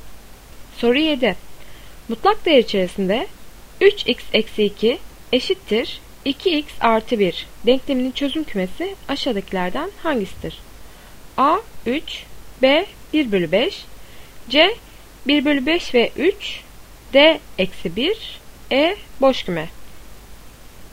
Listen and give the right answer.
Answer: Doğru cevap C 1 bölü 5 ve 3.